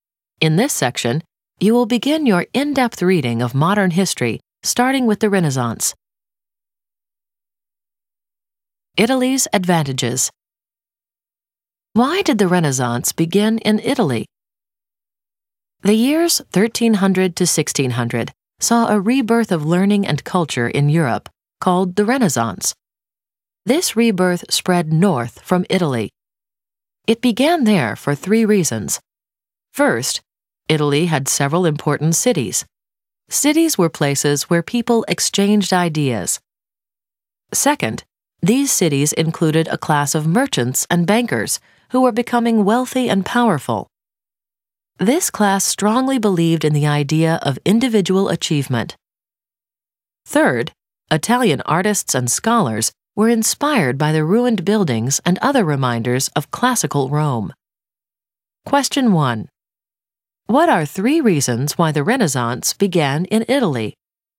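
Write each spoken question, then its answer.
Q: What are three reasons why the Renaissance began in Italy?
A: Italy had several important cities; a wealthy, powerful merchant and banker class that believed in individual achievement; artists and scholars inspired by reminders of classical Rome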